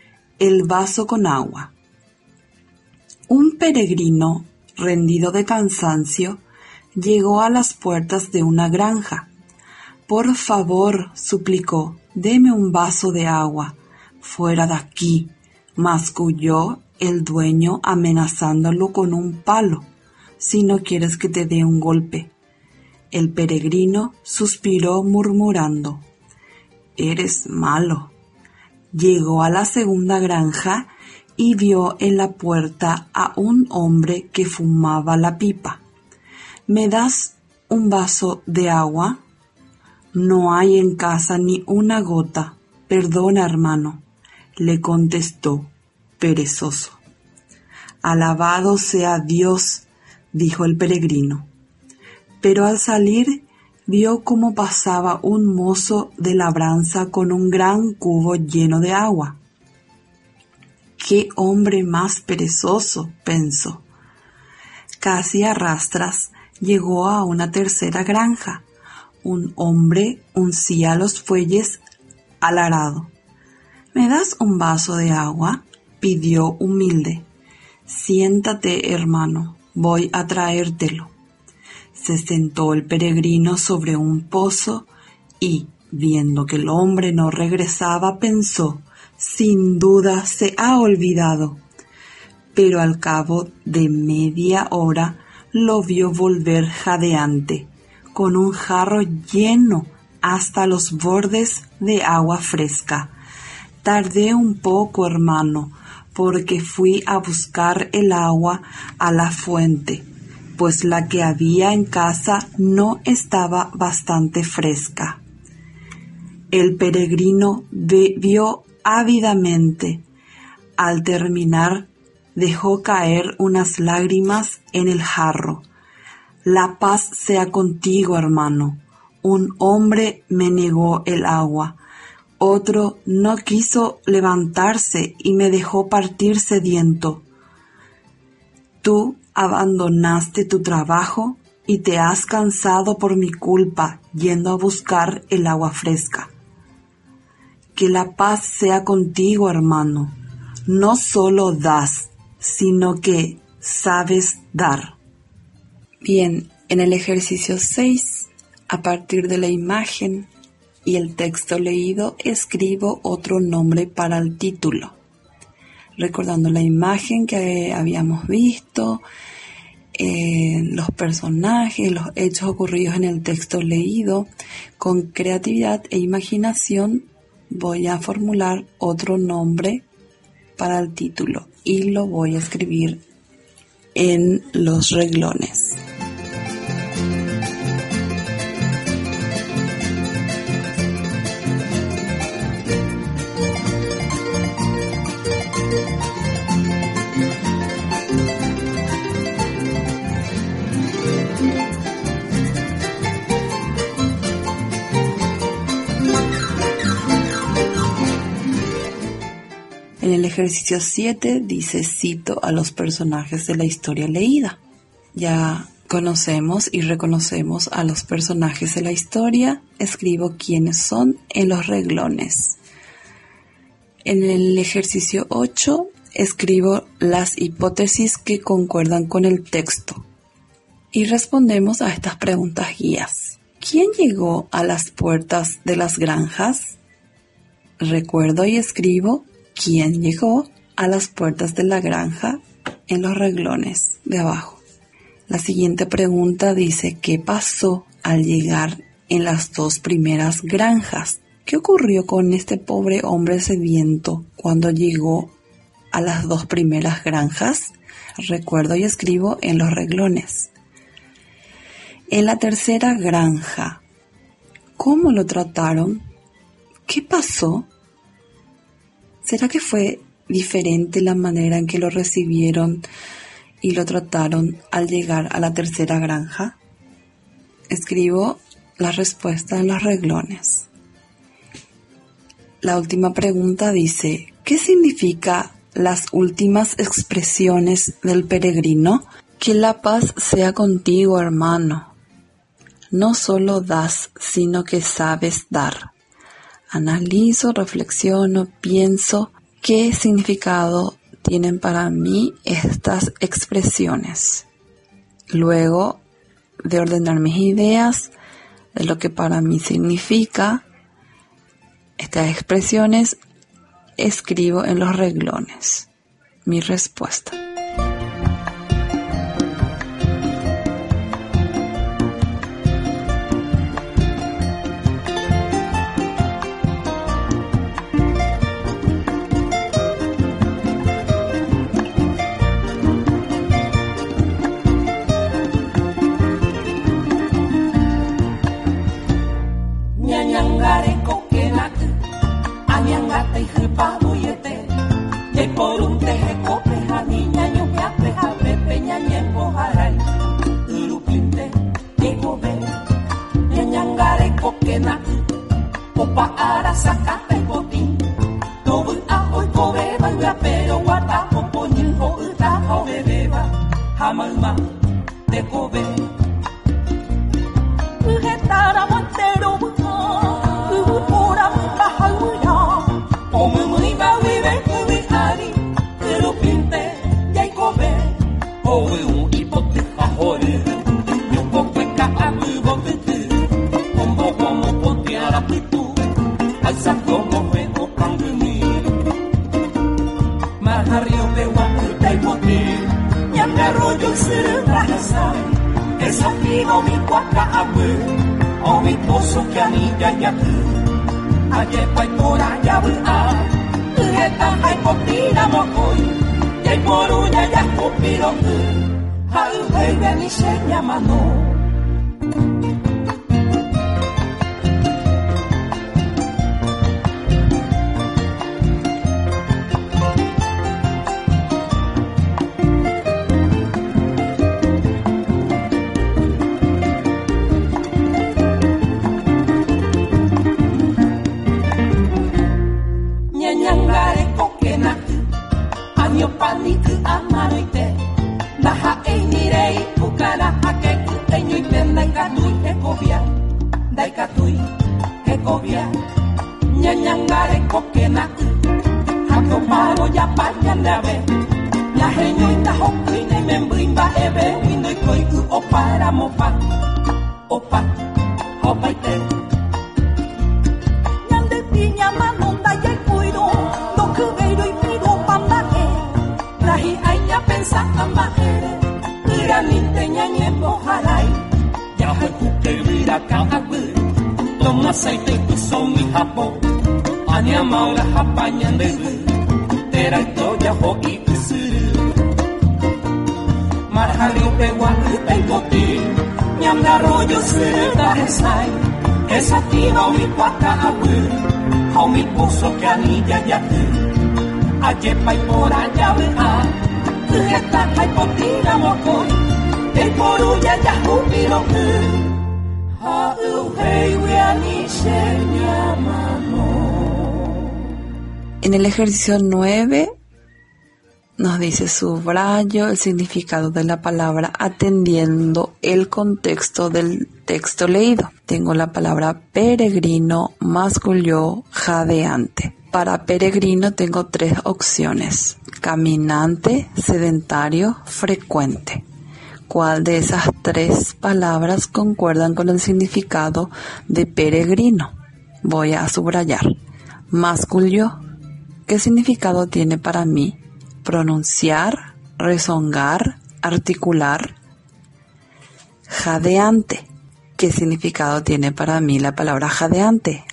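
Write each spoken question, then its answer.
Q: ¿Quién llegó a las puertas de las granjas?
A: Un peregrino rendido de cansancio

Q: ¿qué pasó al llegar en las dos primeras granjas?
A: Le negaron el agua: el primero lo amenazó con un palo y el segundo mintió diciendo que no había agua

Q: En la tercera granja, ¿cómo lo trataron?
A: Bien: lo hicieron sentarse y le trajeron un jarro de agua fresca de la fuente

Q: ¿Cuál de esas tres palabras concuerdan con el significado de peregrino?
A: caminante

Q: ¿Qué significado tiene para mí?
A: rezongar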